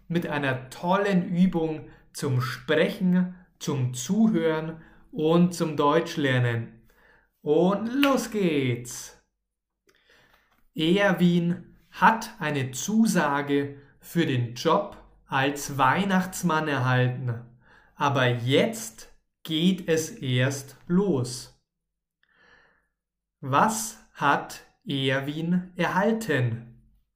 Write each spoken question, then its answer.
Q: Was hat Erwin erhalten?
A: Eine Zusage. Erwin hat eine Zusage erhalten.